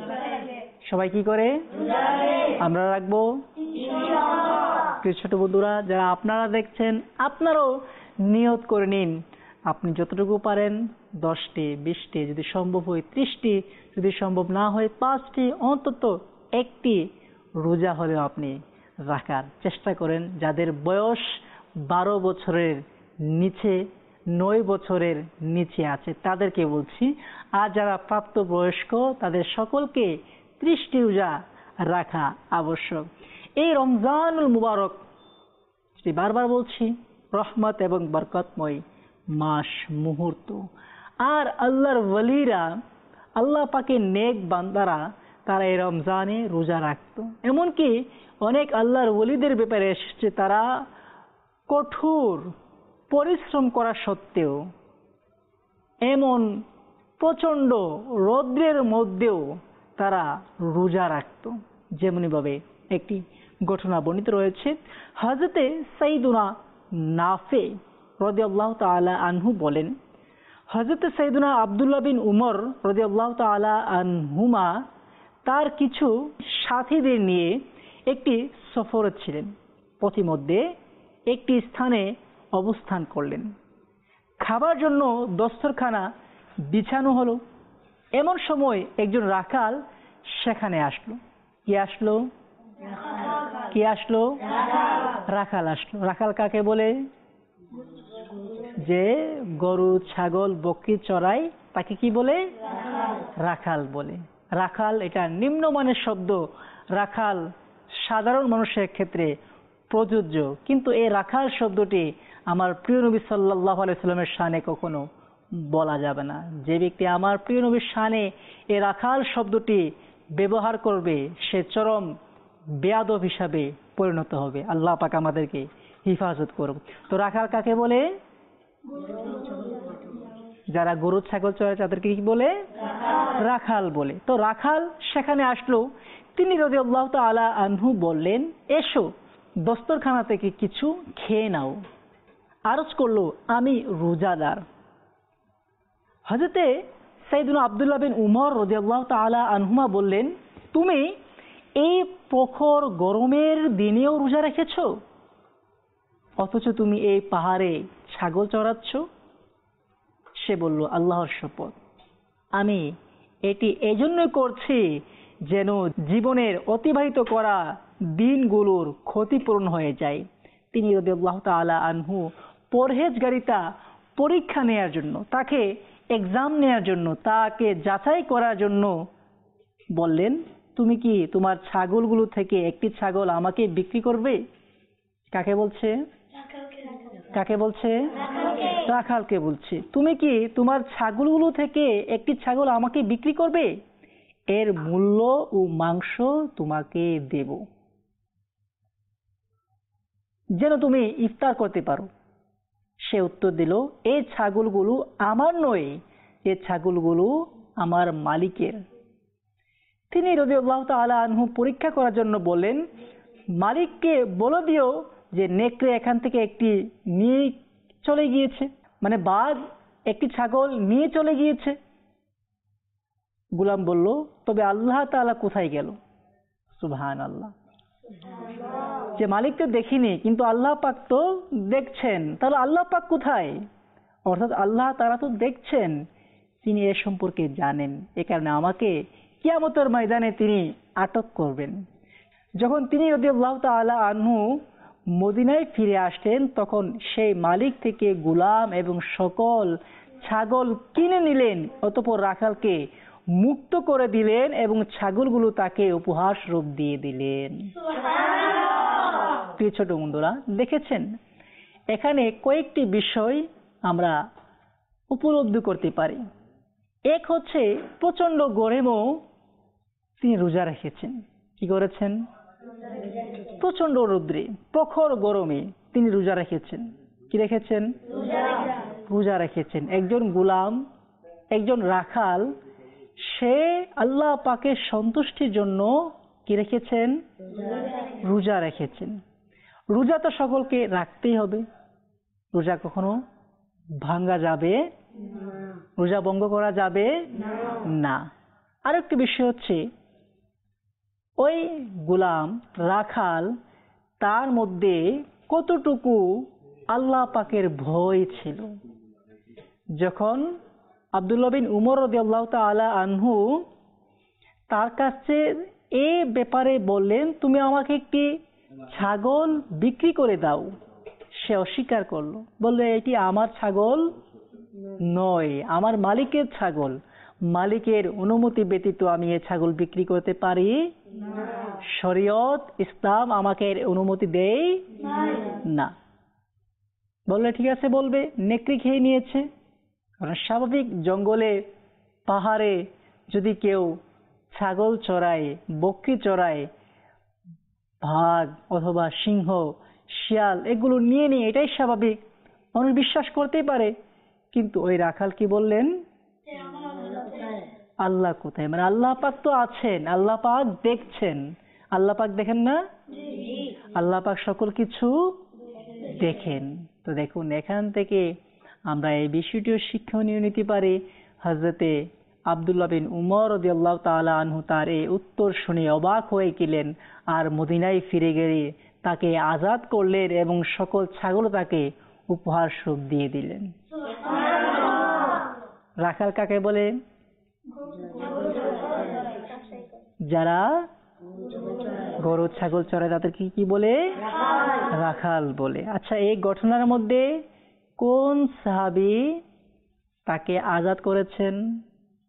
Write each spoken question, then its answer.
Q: আচ্ছা, এই ঘটনার মধ্যে কোন সাহাবি তাকে আজাদ করেছেন,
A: হযরত আব্দুল্লাহ বিন উমর রাদিয়াল্লাহু তাআলা আনহু